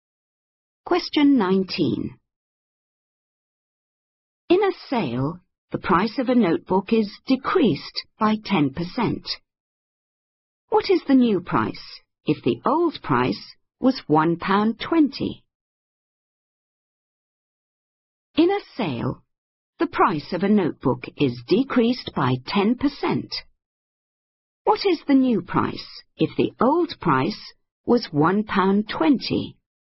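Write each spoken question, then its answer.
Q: What is the new price if the old price was £1.20?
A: £1.08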